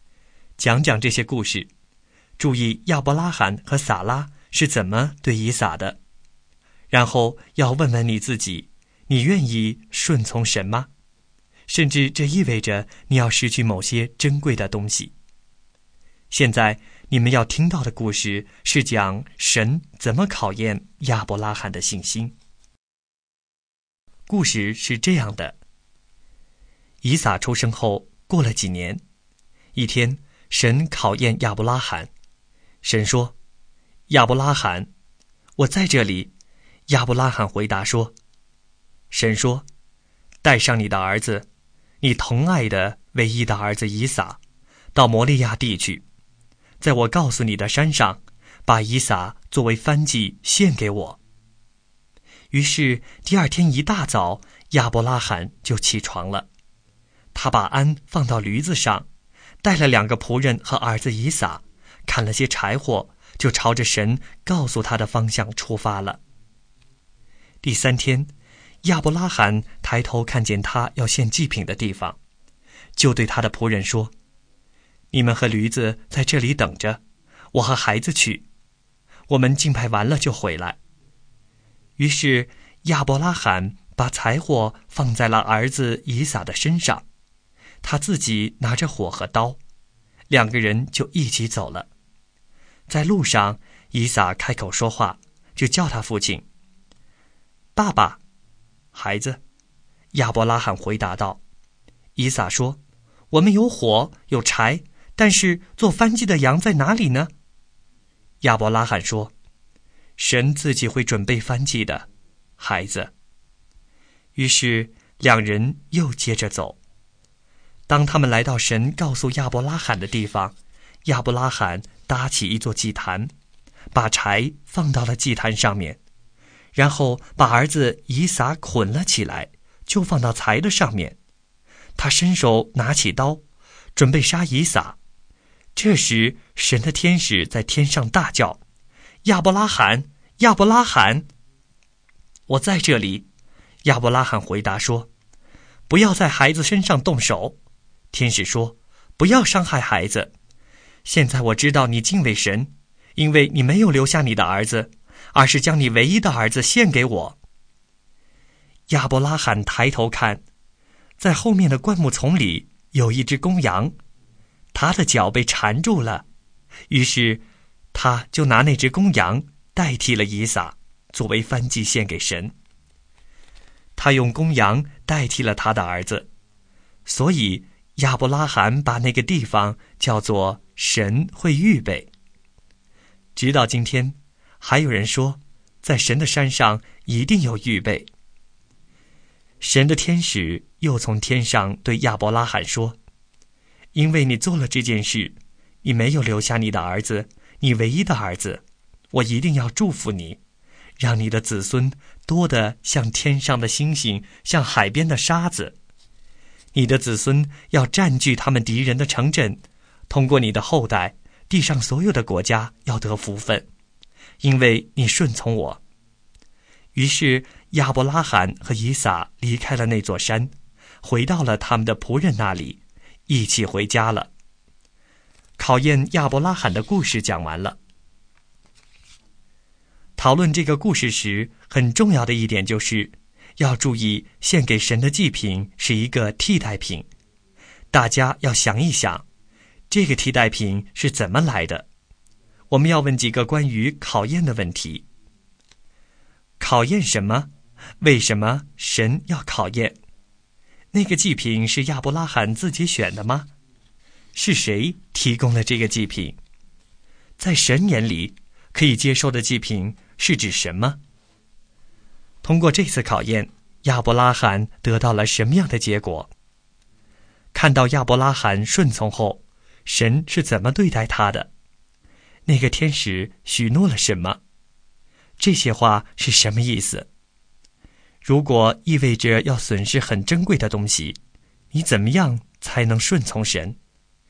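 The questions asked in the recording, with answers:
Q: 考验什么?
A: 考验亚伯拉罕的信心(是否顺从神)

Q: 那个祭品是亚伯拉罕自己选的吗?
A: 不是

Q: 是谁提供了这个祭品?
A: 神(神预备了一只公羊)

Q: 看到亚伯拉罕顺从后,神是怎么对待他的?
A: 神祝福他

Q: 那个天使许诺了什么?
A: 让他的子孙多得像天上的星星、海边的沙子,地上所有的国家都要通过他的后代得福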